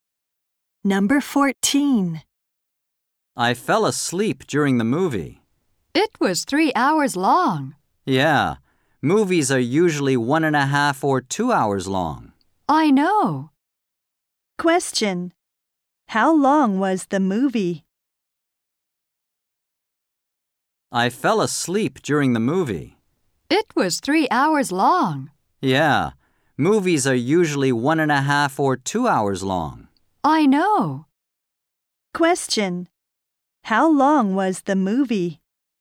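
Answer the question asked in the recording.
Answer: 3 hours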